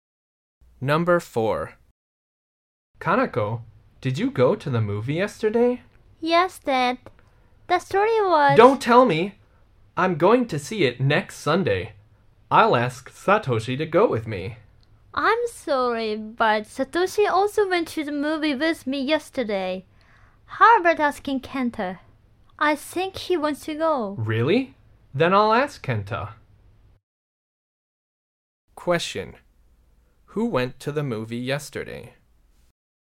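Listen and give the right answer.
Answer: Kanako and Satoshi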